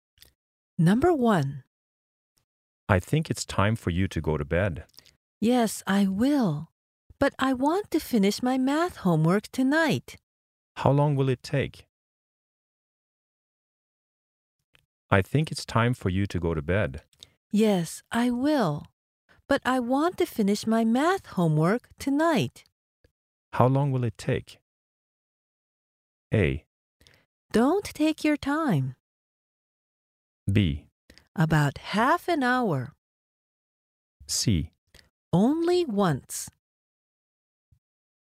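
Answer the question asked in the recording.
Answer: B: About half an hour.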